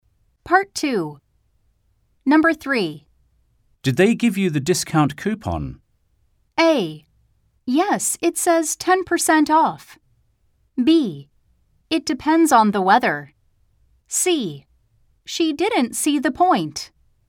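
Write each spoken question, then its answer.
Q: Did they give you the discount coupon?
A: A: Yes, it says 10% off.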